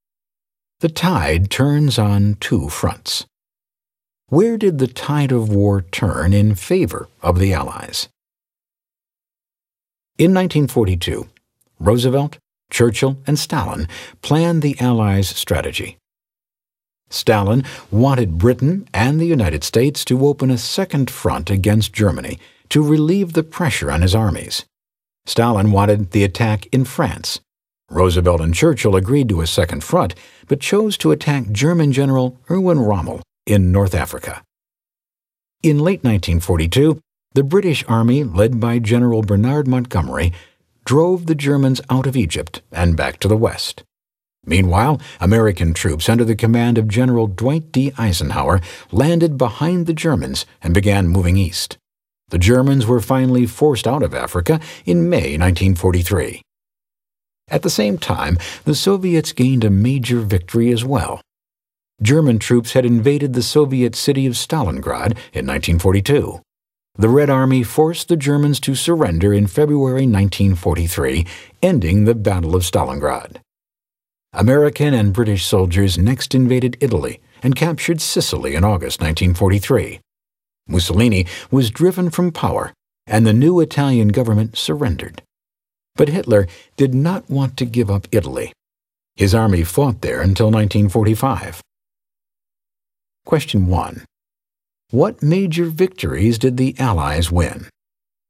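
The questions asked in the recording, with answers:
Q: What major victories did the Allies win?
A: Driving the Germans out of North Africa, winning the Battle of Stalingrad, and capturing Sicily/invading Italy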